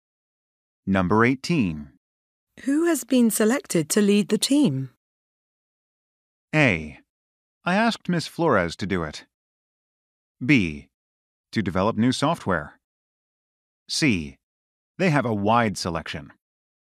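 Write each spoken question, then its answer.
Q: Who has been selected to lead the team?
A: A: I asked Ms. Flores to do it.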